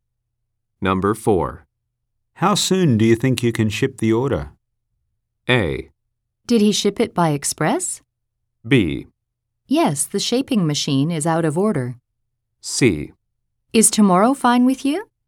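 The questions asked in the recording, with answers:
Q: How soon do you think you can ship the order?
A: C: Is tomorrow fine with you?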